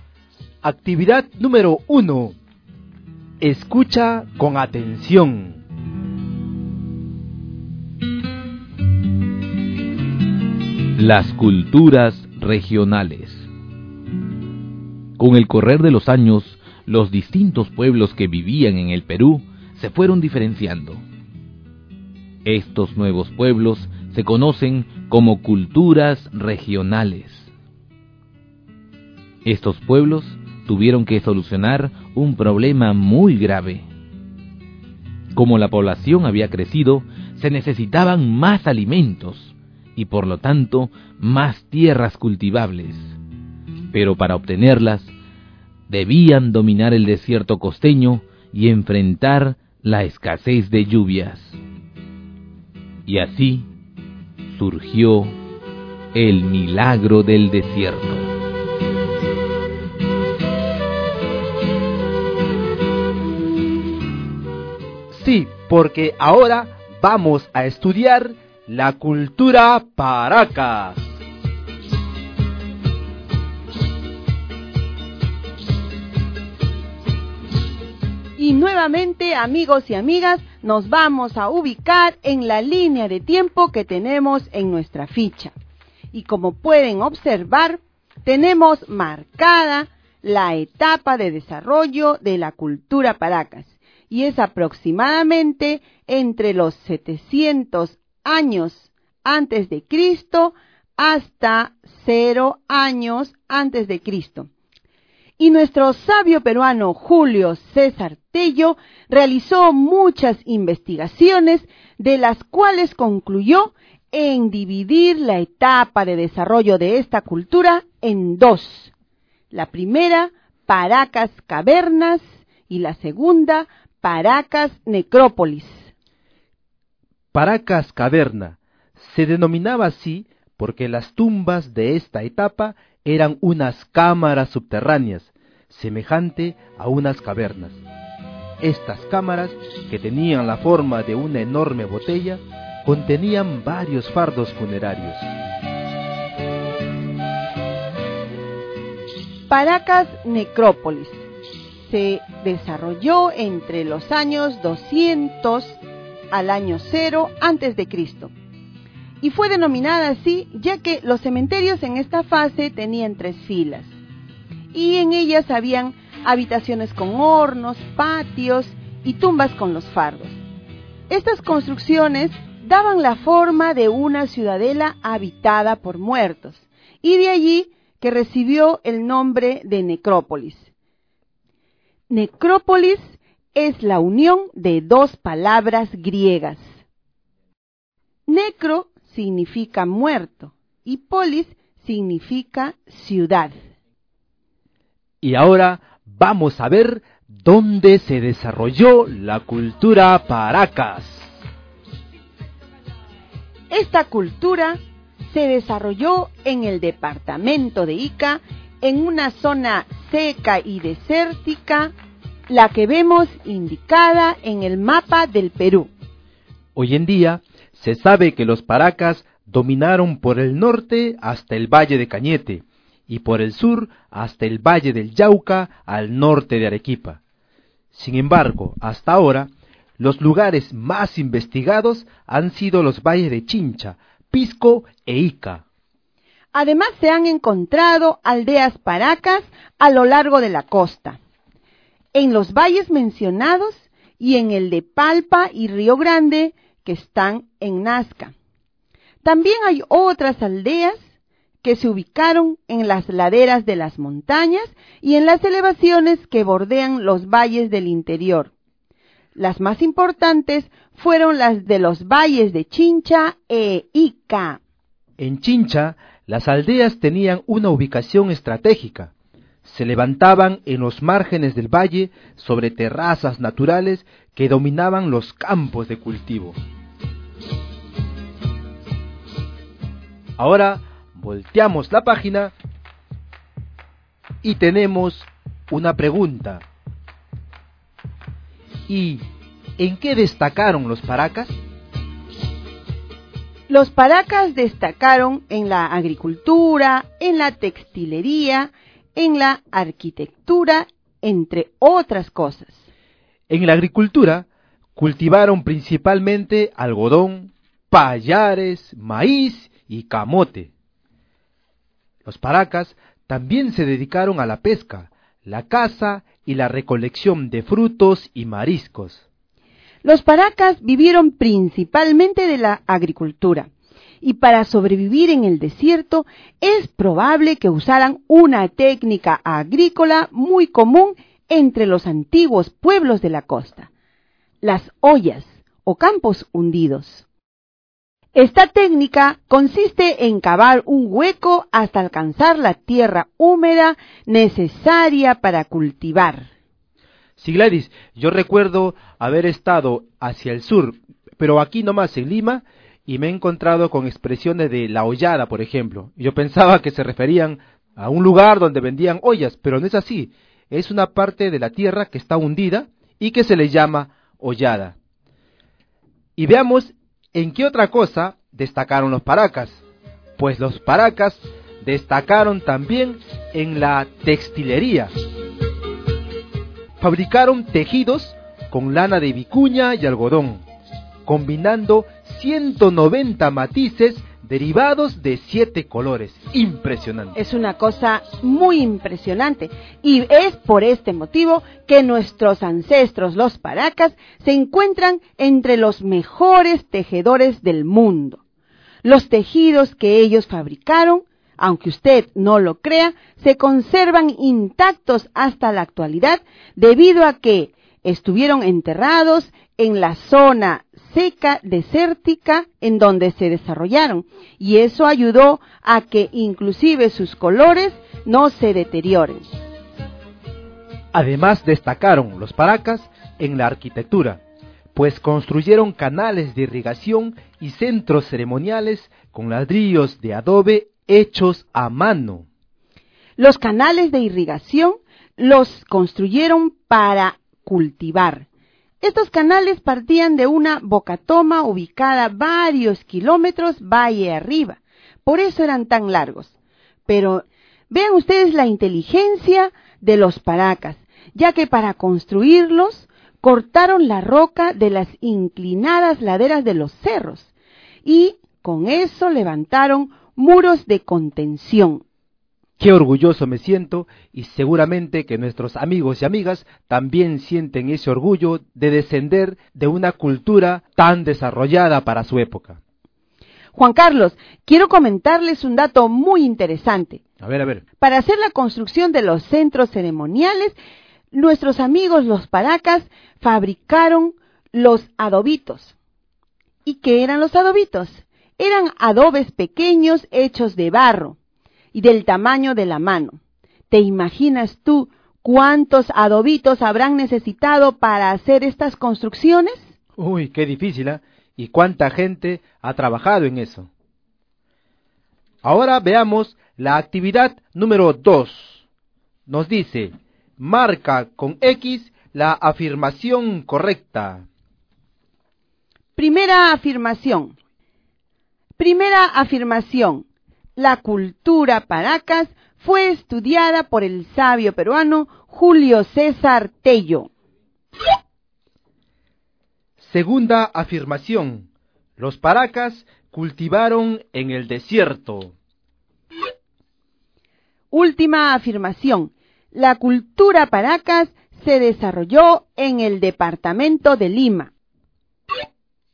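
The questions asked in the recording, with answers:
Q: La cultura paracas fue estudiada por el sabio peruano Julio César Tello.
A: Correcta

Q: Los paracas cultivaron en el desierto.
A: Correcta

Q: La cultura paracas se desarrolló en el departamento de Lima.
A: Incorrecta (se desarrolló en Ica)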